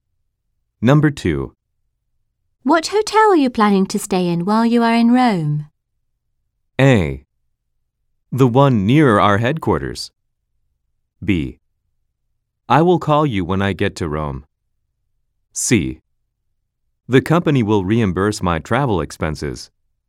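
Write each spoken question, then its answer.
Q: What hotel are you planning to stay in while you are in Rome?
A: A: The one near our headquarters.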